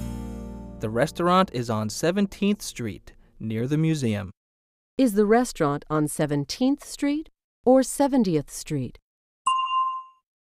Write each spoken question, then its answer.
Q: Is the restaurant on 17th Street or 70th Street?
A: It's on 17th Street. 17.